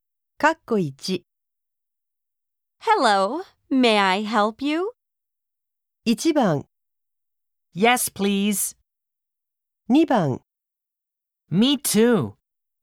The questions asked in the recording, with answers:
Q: Hello, may I help you?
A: 答えは、1番の Yes, please.